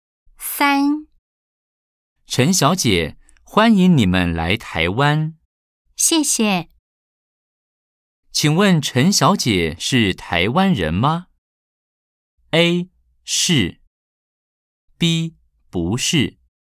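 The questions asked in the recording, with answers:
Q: 请问陈小姐是台湾人吗?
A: B: 不是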